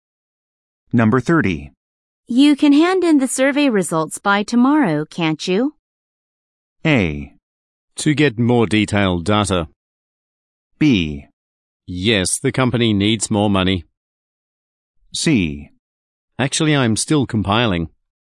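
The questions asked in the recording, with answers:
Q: You can hand in the survey results by tomorrow, can't you?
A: C: Actually, I'm still compiling.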